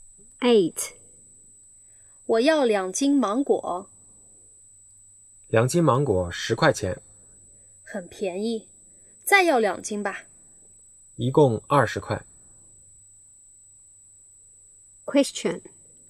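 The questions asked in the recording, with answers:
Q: 女的买多少斤芒果?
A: 四斤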